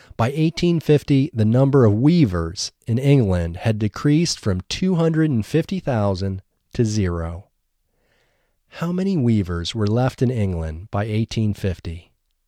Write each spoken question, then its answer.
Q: How many weavers were left in England by 1850?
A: By 1850, zero weavers were left in England.